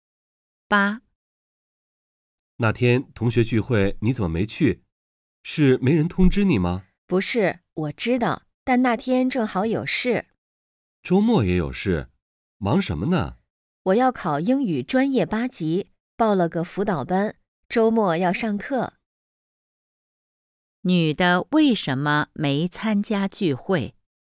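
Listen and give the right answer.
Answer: 周末要上英语专业八级辅导班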